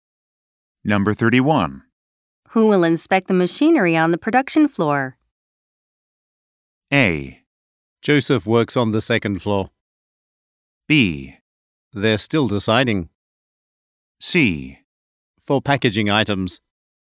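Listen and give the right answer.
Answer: B: They're still deciding.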